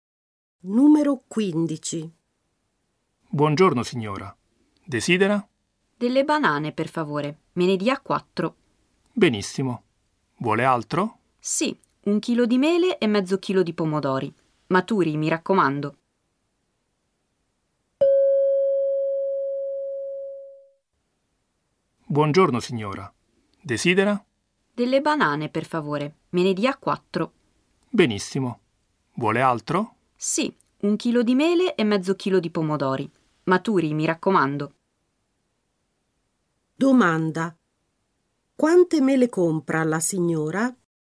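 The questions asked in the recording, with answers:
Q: Quante mele compra la signora?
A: Un chilo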